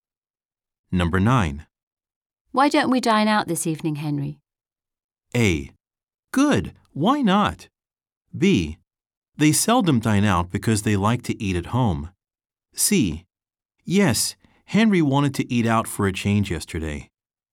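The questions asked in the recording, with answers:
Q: Why don't we dine out this evening, Henry?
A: A: Good, why not?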